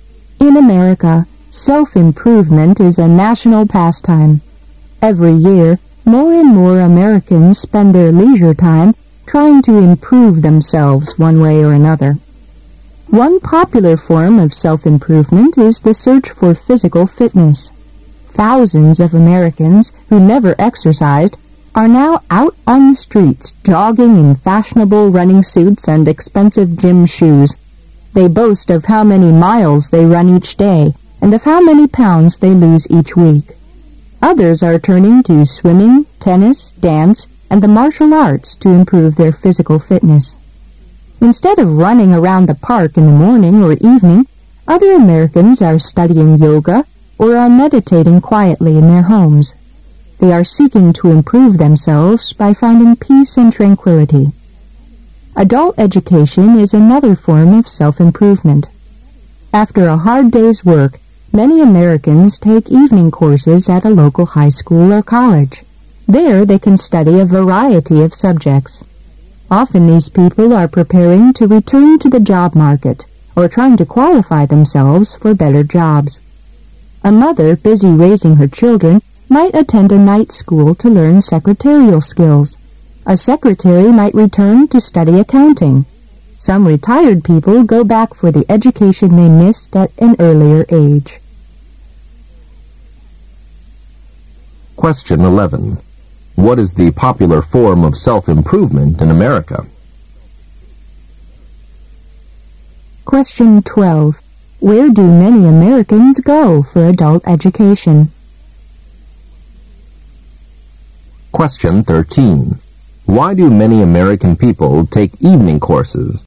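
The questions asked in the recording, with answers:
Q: What is the popular form of self-improvement in America?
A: The search for physical fitness

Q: Where do many Americans go for adult education?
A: Evening courses at a local high school or college

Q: Why do many American people take evening courses?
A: To prepare to return to the job market or qualify for better jobs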